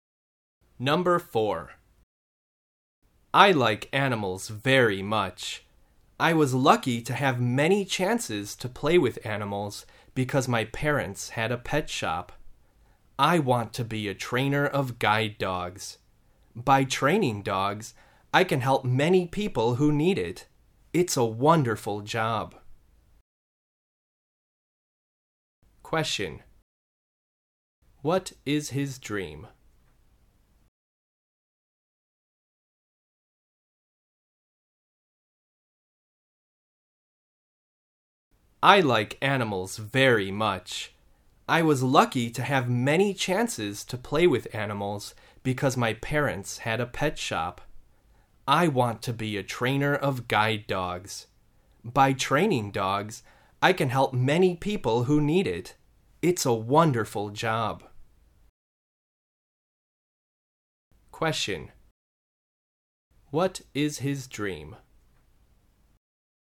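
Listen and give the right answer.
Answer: To be a trainer of guide dogs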